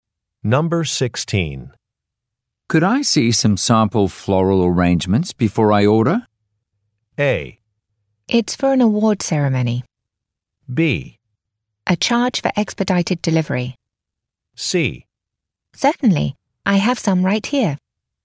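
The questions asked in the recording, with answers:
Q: Could I see some sample floral arrangements before I order?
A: C: Certainly, I have some right here.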